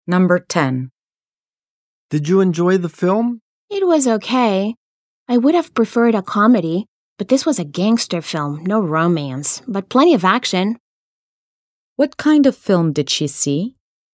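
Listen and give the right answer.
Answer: A gangster film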